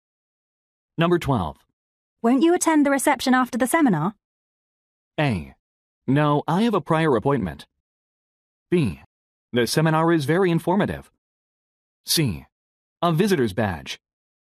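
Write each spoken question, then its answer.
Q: Won't you attend the reception after the seminar?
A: A: No, I have a prior appointment.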